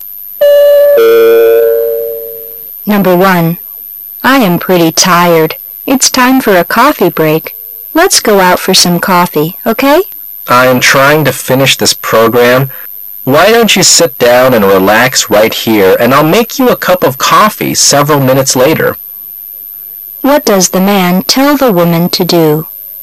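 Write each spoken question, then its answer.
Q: What does the man tell the woman to do?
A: Sit down and relax there while he makes coffee later

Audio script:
[解析] W: I am pretty tired. It's time for a coffee break. Let's go out for some coffee, okay? M: I am trying to finish this program. Why don't you sit down and relax right here and I'll make you a cup of coffee several minutes later. Q: What does the man tell the woman to do?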